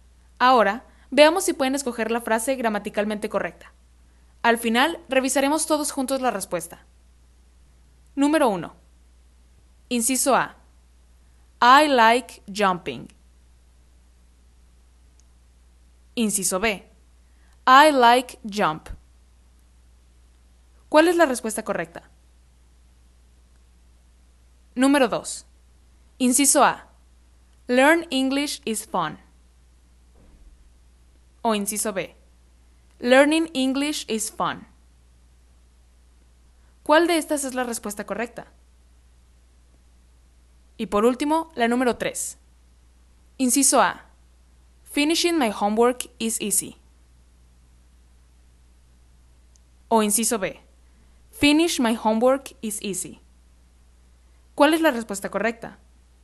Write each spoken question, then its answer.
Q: Número uno. Inciso A. I like jumping. Inciso B. I like jump. ¿Cuál es la respuesta correcta?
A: En la número 1, la respuesta correcta es la A, ya que va directamente después del verbo like.